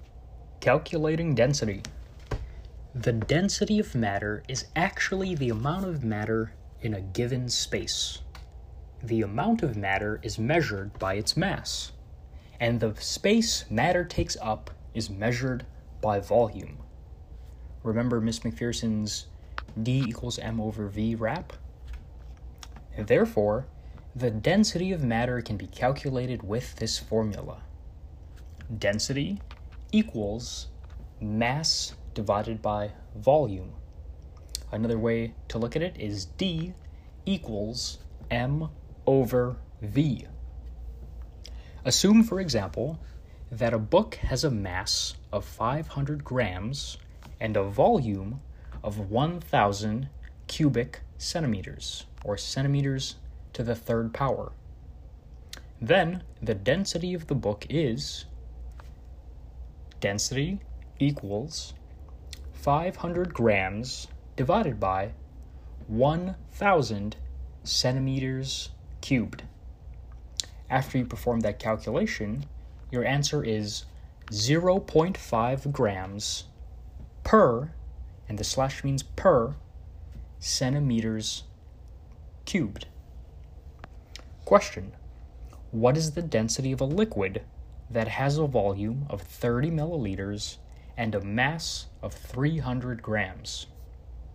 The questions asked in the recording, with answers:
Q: What is the density of a liquid that has a volume of 30 milliliters and a mass of 300 grams?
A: And that gives us 10 grams per milliliter.